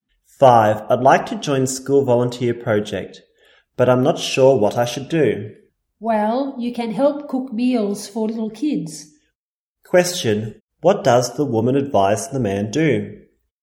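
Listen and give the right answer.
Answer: Help cook meals for little kids.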